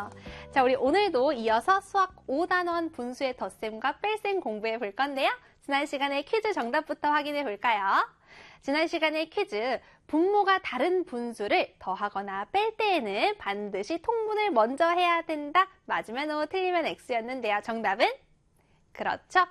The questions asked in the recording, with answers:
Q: 분모가 다른 분수를 더하거나 뺄 때에는 반드시 통분을 먼저 해야 된다. 맞으면 O, 틀리면 X였는데요.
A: 5였습니다